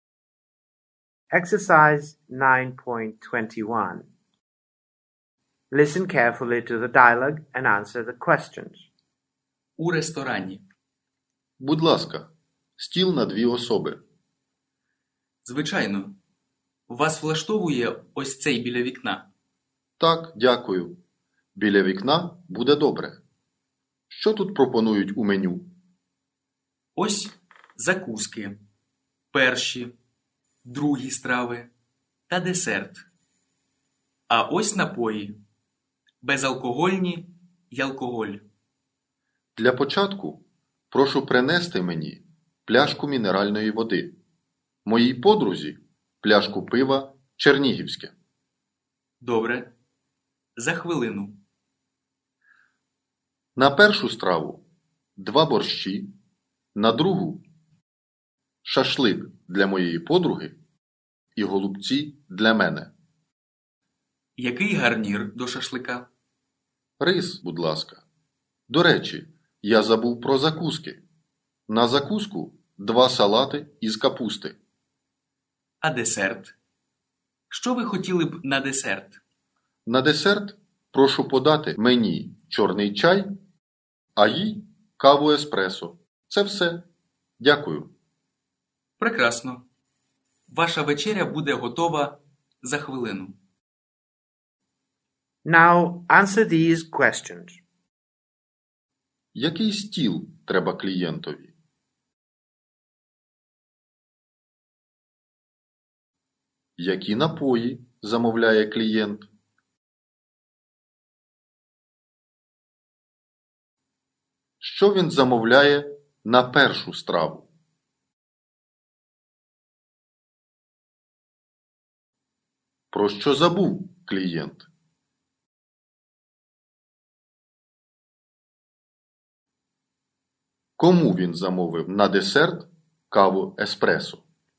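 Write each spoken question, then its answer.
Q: Який стіл треба клієнтові?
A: Стіл на дві особи біля вікна

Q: Які напої замовляє клієнт?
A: Пляшку мінеральної води і пляшку пива «Чернігівське»

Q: Що він замовляє на першу страву?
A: Два борщі

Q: Про що забув клієнт?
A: Про закуски

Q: Кому він замовив на десерт каву-еспресо?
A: Своїй подрузі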